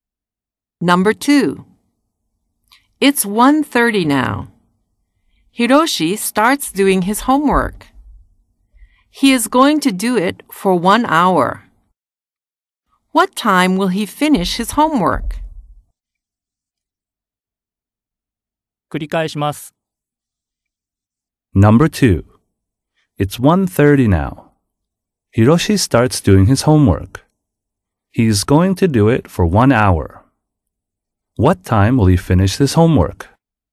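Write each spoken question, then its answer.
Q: What time will he finish his homework?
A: 2:30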